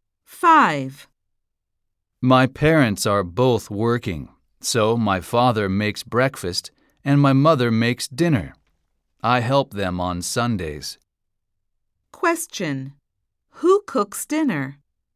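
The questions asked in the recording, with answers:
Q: Who cooks dinner?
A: The mother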